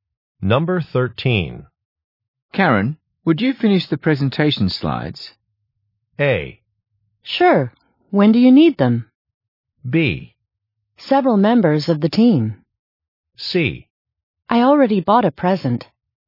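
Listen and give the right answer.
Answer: A: Sure. When do you need them?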